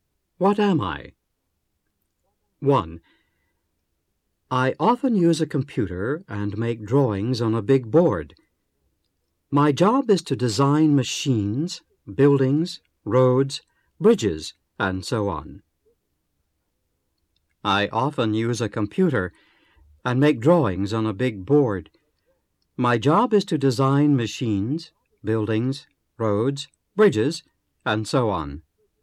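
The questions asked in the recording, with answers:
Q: What am I?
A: An engineer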